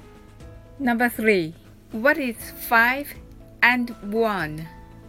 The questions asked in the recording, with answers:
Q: What is 5 and 1?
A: The answer is 6.